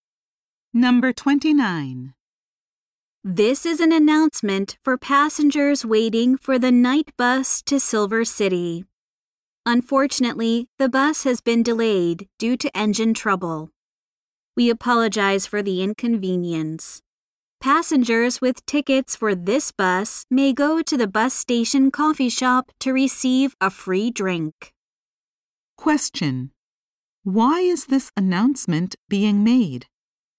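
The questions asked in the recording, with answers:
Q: Why is this announcement being made?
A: The night bus has been delayed due to engine trouble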